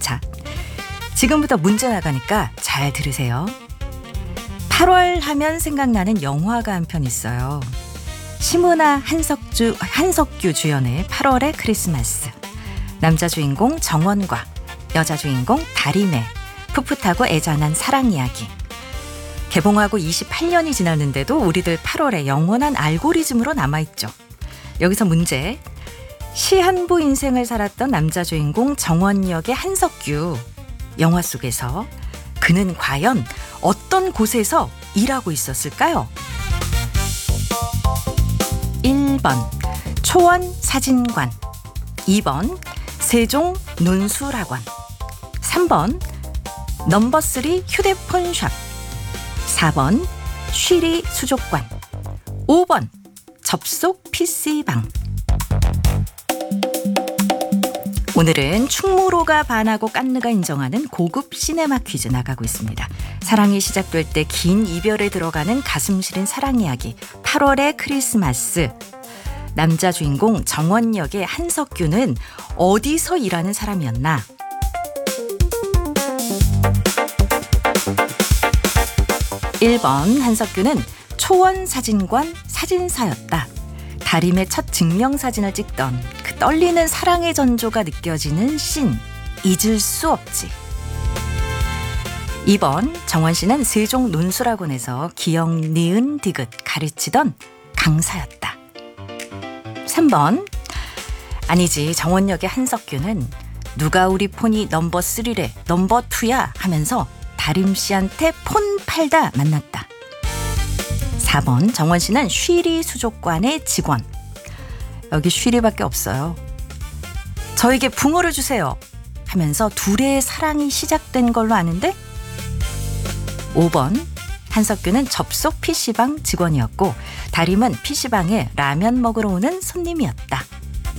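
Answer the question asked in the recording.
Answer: 1번: 초원 사진관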